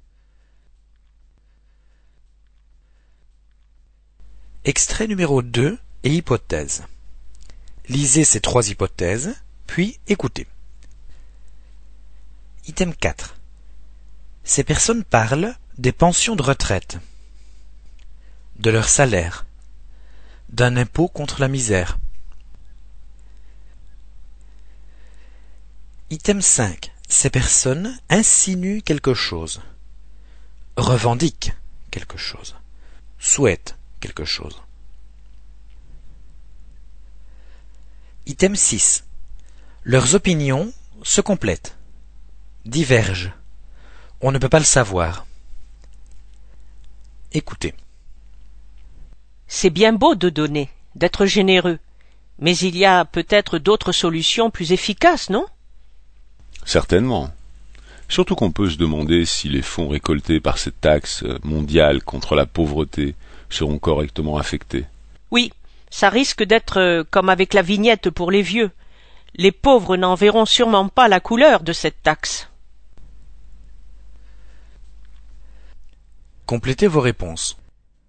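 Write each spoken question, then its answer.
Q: Ces personnes parlent des pensions de retraite, de leur salaire, d'un impôt contre la misère.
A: C: d'un impôt contre la misère

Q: Leurs opinions se complètent, divergent. On ne peut pas le savoir.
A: A: se complètent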